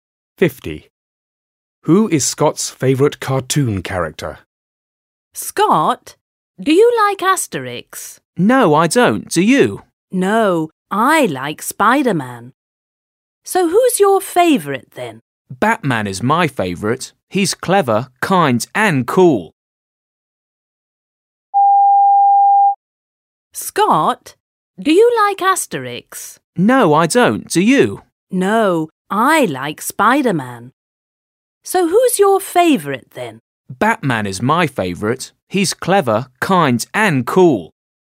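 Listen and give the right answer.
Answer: Batman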